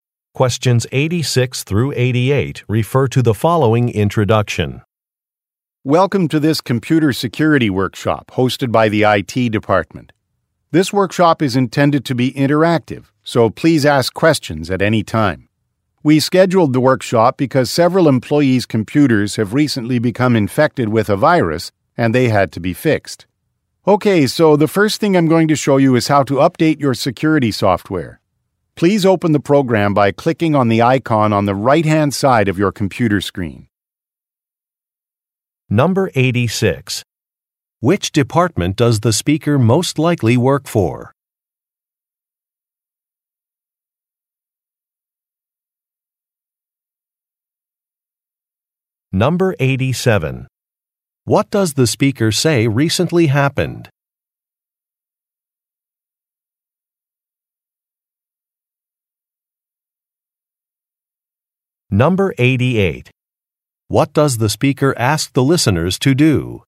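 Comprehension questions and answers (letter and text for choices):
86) Which department does the speaker most likely work for?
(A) Product Development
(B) Research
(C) Engineering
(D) Information Technology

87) What does the speaker say recently happened?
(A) Some certification classes began.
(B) Name badges were handed out.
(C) A virus infected some computers.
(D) A manager retired.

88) What does the speaker ask the listeners to do?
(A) Sign an attendance sheet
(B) Open a software program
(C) Submit some photos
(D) View a slideshow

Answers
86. (D) Information Technology
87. (C) A virus infected some computers.
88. (B) Open a software program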